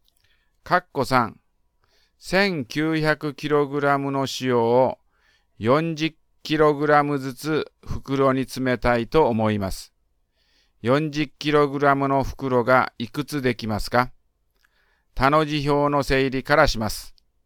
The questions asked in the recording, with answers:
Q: 40kg の袋がいくつできますか?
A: だから、答えは47袋です。